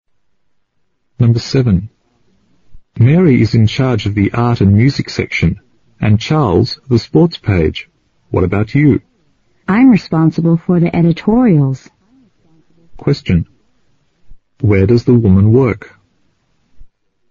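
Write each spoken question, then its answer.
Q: Where does the woman work?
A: At a newspaper office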